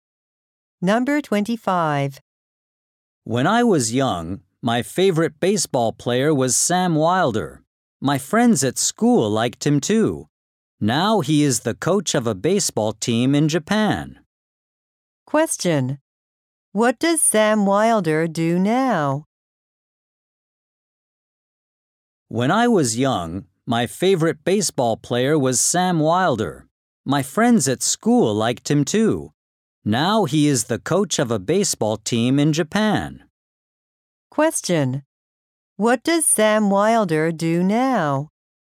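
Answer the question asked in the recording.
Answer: He is the coach of a baseball team in Japan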